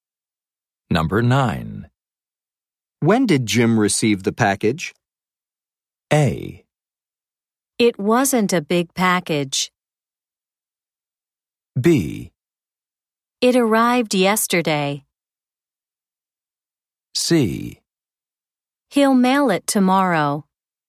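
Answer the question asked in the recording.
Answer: B: It arrived yesterday.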